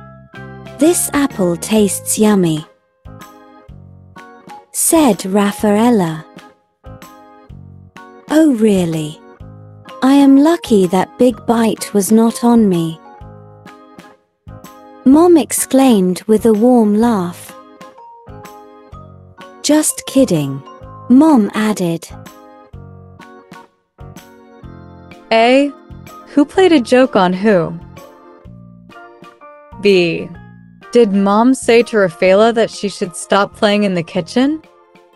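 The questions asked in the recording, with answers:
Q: Who played a joke on who?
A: Mom played a joke on Rafaela

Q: Did Mom say to Rafaela that she should stop playing in the kitchen?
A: No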